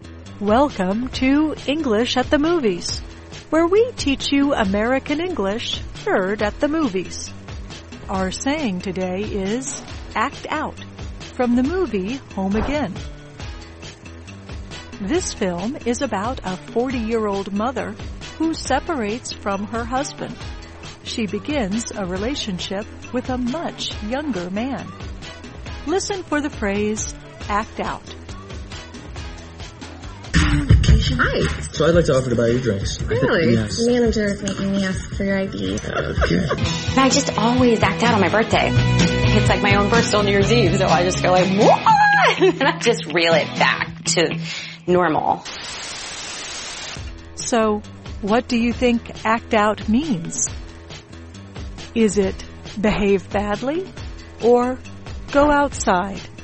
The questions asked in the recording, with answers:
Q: So, what do you think act out means? Is it behave badly or go outside?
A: To act out means to behave badly, often as a way to deal with emotional stress.